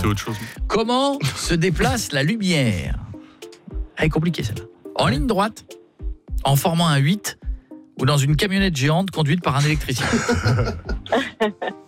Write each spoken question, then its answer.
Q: Comment se déplace la lumière ?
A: Non, bah, je dirais en ligne droite.